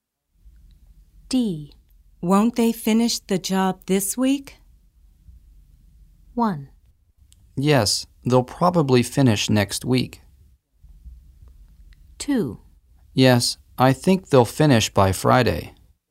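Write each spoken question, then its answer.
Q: Won't they finish the job this week?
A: 2: Yes, I think they'll finish by Friday.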